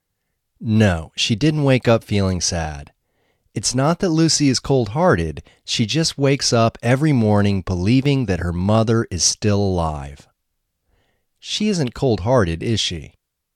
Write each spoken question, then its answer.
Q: She isn't cold-hearted, is she?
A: No, she isn't cold-hearted.